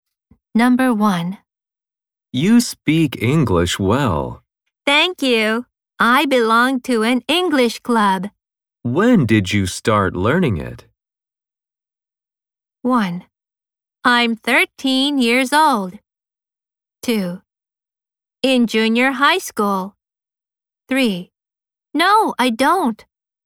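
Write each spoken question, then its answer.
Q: When did you start learning it?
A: 2: In junior high school.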